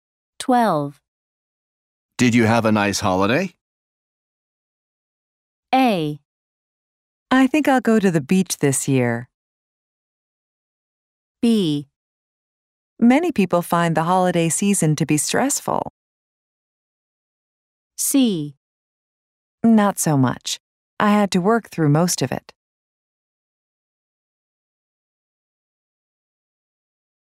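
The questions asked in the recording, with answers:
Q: Did you have a nice holiday?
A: C: Not so much. I had to work through most of it.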